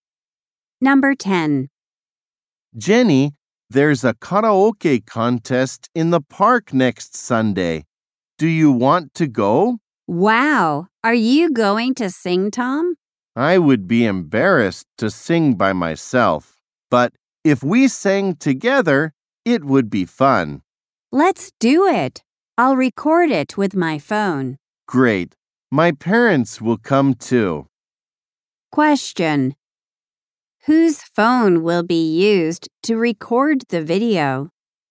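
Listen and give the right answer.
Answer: Jenny's phone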